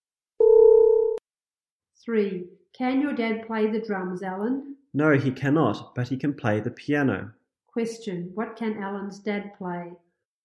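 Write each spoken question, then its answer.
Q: What can Alan's dad play?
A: The piano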